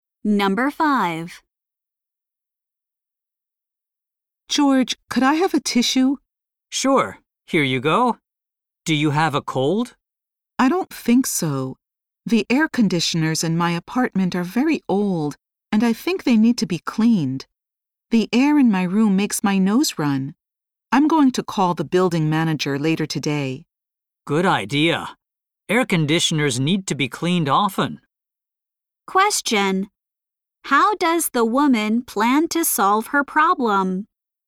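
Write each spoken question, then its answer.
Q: How does the woman plan to solve her problem?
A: By calling the building manager (to have the air conditioners cleaned)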